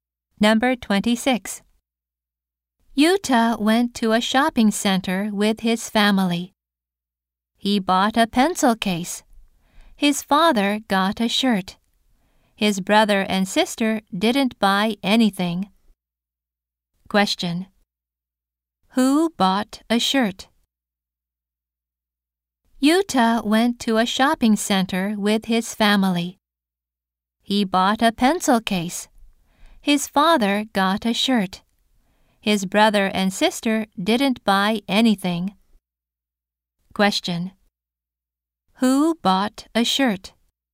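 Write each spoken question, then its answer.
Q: Question. Who bought a shirt?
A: Yuta's father.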